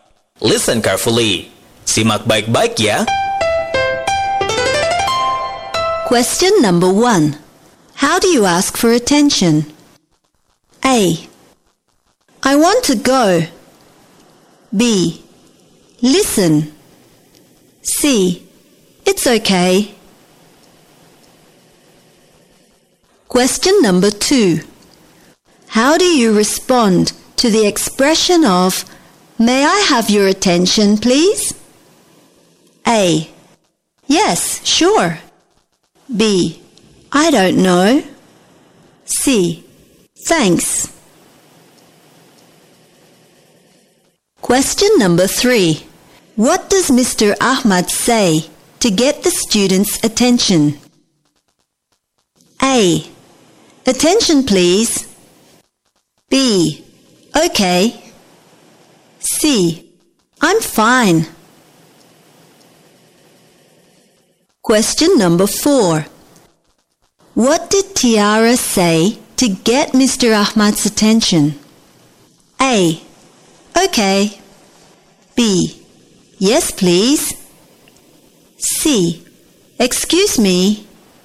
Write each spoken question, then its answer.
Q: How do you ask for attention?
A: Sahabat cerdas, jawaban yang benar untuk pertanyaan nomor 1 adalah B.

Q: How do you respond to the expression of May I have your attention, please?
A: Sahabat cerdas, jawaban yang benar untuk pertanyaan nomor 2 adalah A.